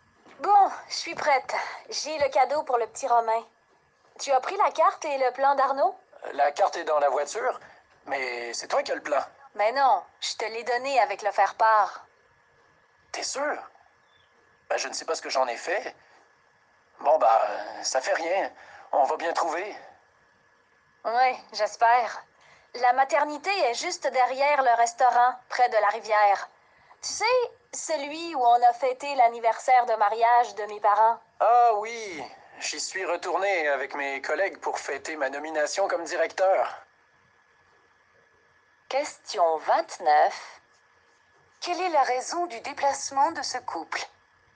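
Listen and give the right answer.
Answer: Rendre visite à un nouveau-né (la naissance du petit Romain) à la maternité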